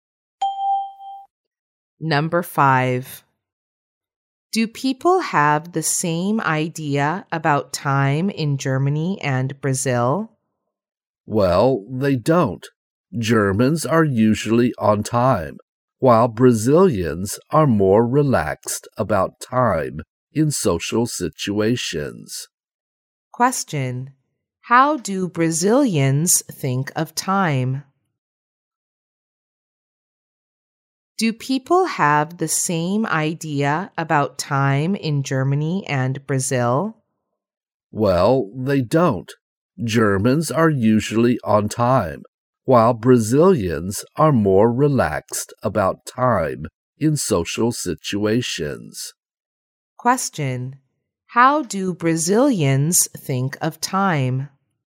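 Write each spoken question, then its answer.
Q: how do Brazilians think of time?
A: They are more relaxed about time in social situations.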